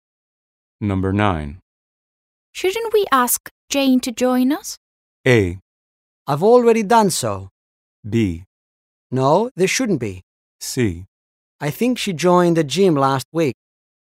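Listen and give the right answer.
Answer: A: I've already done so.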